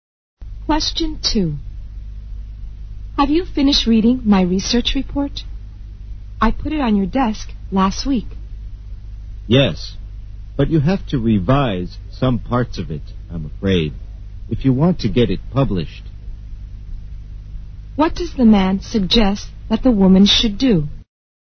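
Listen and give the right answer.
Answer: Revise some parts of her research report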